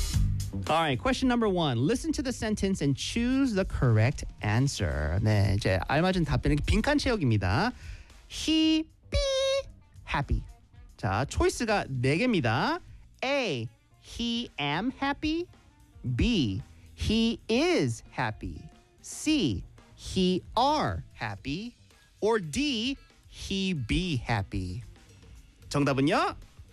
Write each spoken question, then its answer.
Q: Listen to the sentence and choose the correct answer.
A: That's right. 정답은 B, he is happy.